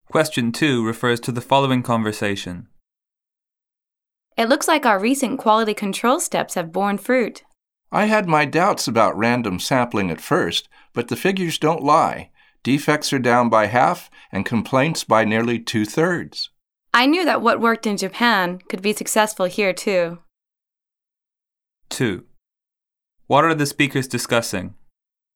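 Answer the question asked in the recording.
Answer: The success of their new quality control steps (random sampling), which cut defects and complaints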